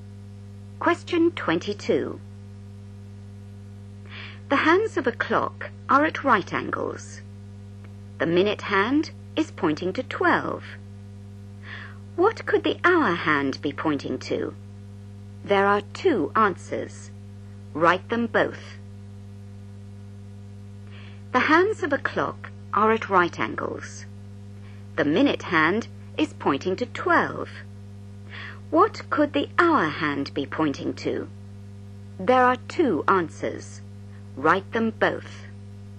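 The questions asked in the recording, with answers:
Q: What could the hour hand be pointing to?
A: 3 or 9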